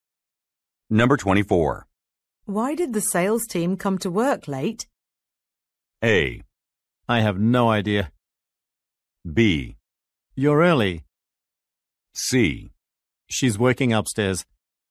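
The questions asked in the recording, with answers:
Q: Why did the sales team come to work late?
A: A: I have no idea.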